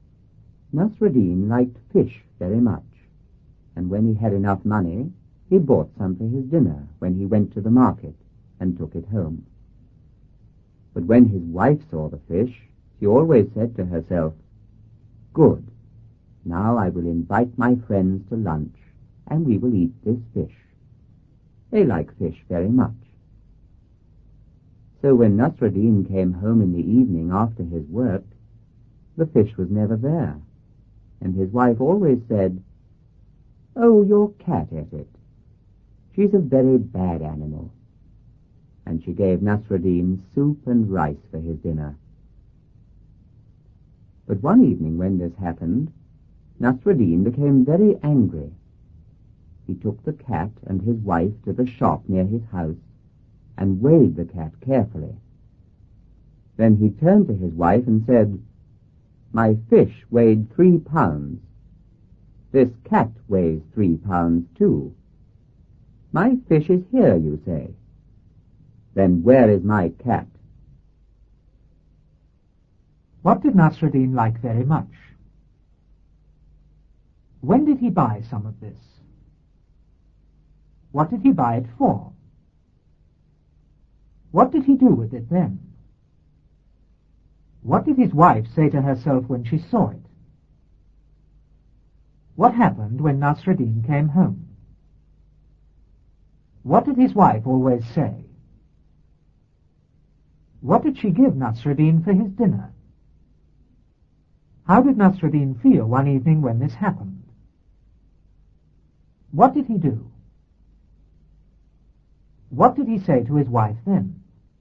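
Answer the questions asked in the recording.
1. Fish
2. When he had enough money
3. For his dinner
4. He took it home
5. Good, now I will invite my friends to lunch, and we will eat this fish
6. The fish was never there
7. Your cat ate it
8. Soup and rice
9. Very angry
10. He took the cat and his wife to the shop and weighed the cat
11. My fish weighed 3 pounds; this cat weighs 3 pounds too. My fish is here, then where is my cat?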